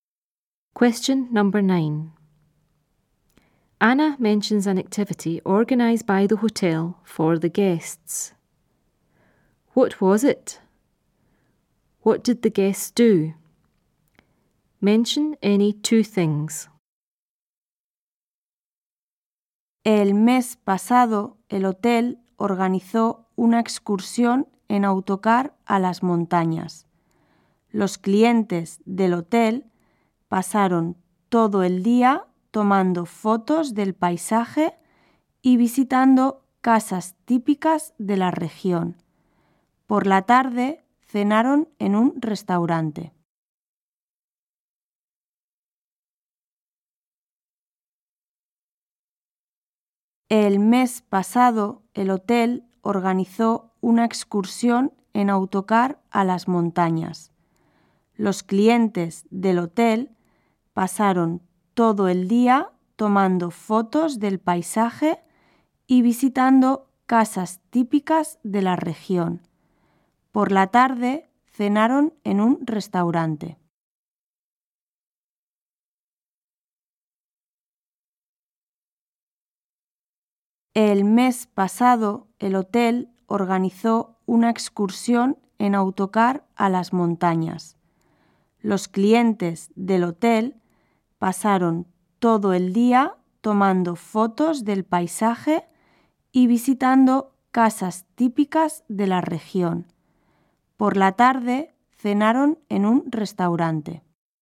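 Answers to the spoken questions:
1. A coach trip to the mountains
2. Took photos of the scenery, visited typical houses, had dinner in a restaurant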